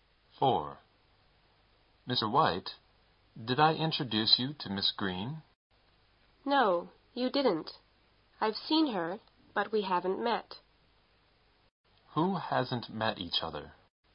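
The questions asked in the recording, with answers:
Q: Who hasn't met each other?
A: Mr. White and Miss Green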